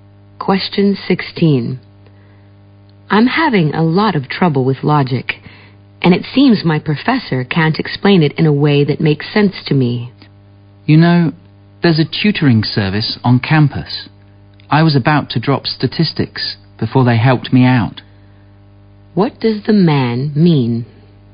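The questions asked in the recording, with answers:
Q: What does the man mean?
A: The woman should go to the campus tutoring service.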